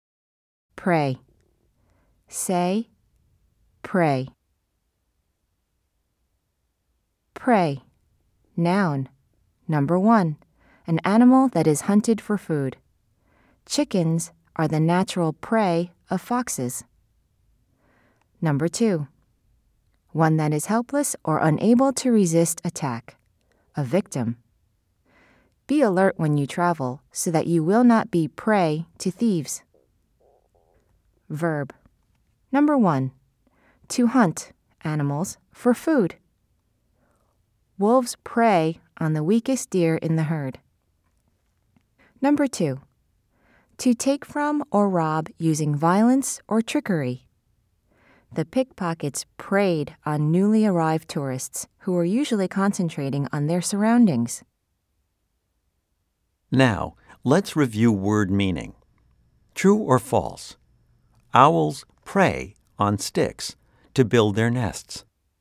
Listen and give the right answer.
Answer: If you said false, you are right.